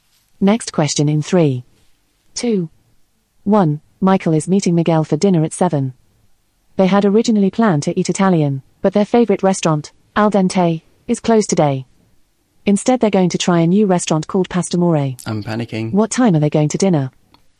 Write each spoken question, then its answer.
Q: What time are they going to dinner?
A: the answer was seven.